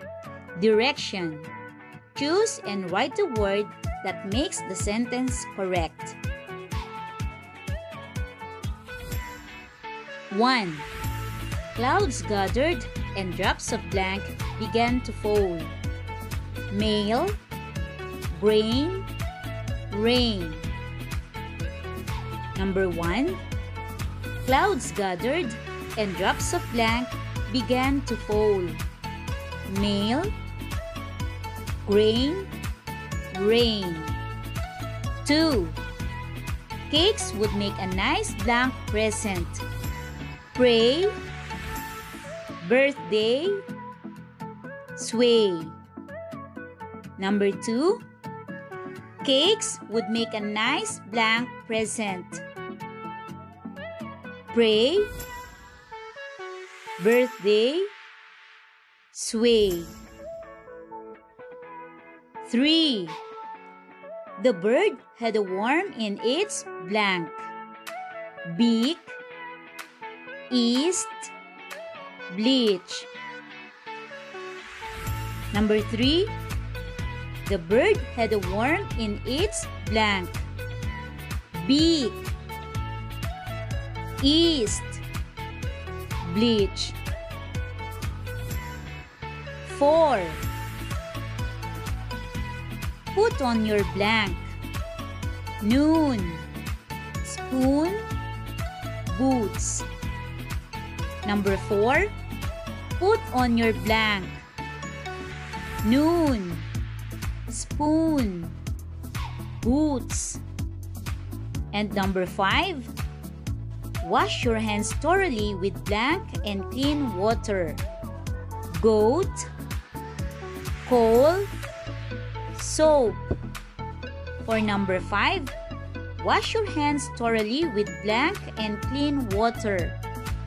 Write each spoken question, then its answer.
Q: Clouds gathered and drops of blank began to fall. Mail, grain, rain.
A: Number 1 answer is rain.

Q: Cakes would make a nice blank present. Pray, birthday, sway.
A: 2. Birthday.

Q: The bird had a worm in its blank. Beak, east, bleach.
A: 3. Beak.

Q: Put on your blank. Noon, spoon, boots.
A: 4. Boots.

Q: Wash your hands thoroughly with blank and clean water. Goat, coal, soap.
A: And 5. Soap.